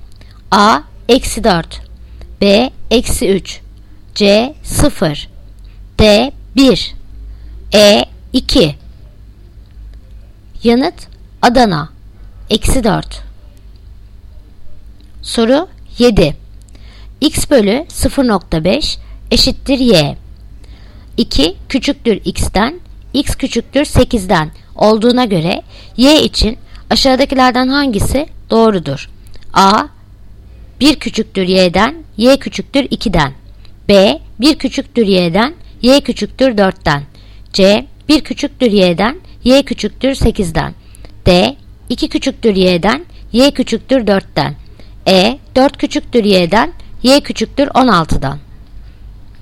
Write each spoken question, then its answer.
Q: 2 küçüktür x'ten, x küçüktür 8'den olduğuna göre y için aşağıdakilerden hangisi doğrudur?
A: Yanıt Edirne. 4 küçüktür y'den, y küçüktür 16'dan.